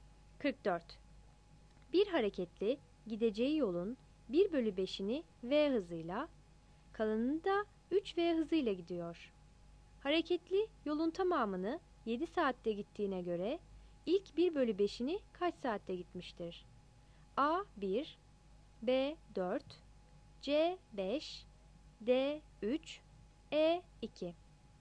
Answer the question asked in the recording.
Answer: 44 D